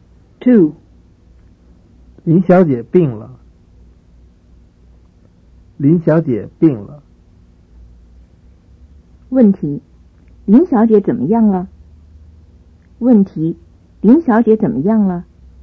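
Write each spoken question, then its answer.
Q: 林小姐怎么样了?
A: 病了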